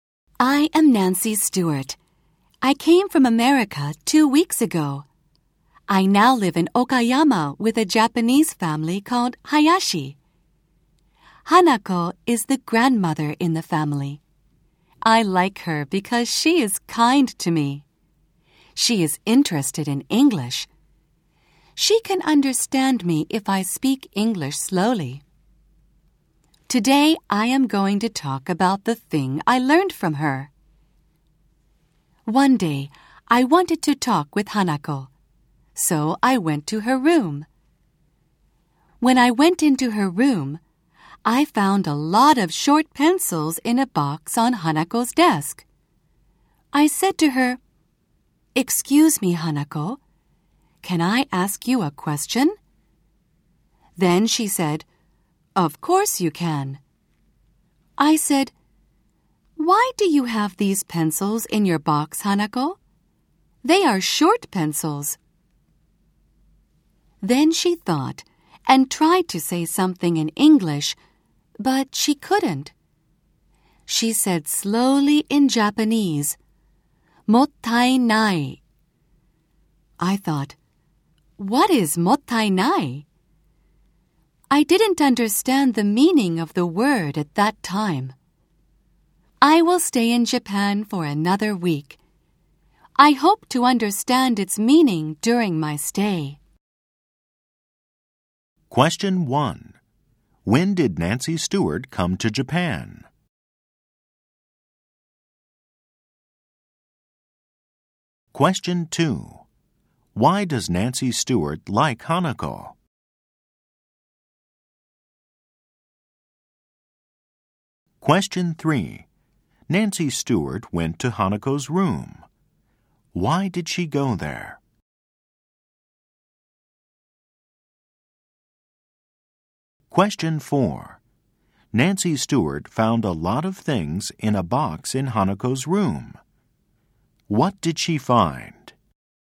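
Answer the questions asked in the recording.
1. Two weeks ago.
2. Because she is kind to her.
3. Because she wanted to talk with Hanako.
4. A lot of short pencils.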